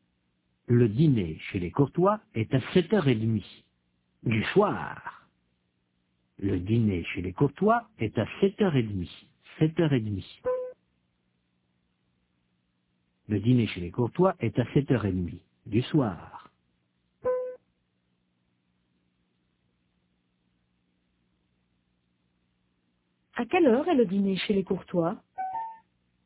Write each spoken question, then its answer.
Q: À quelle heure est le dîner chez les Courtois ?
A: À 7h30 du soir.